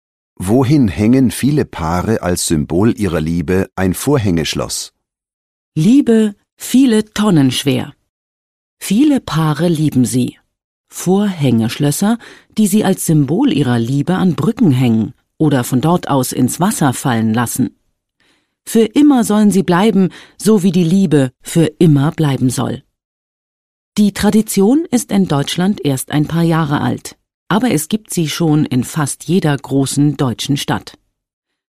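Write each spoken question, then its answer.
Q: Wohin hängen viele Paare als Symbol ihrer Liebe ein Vorhängeschloss?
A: An Brücken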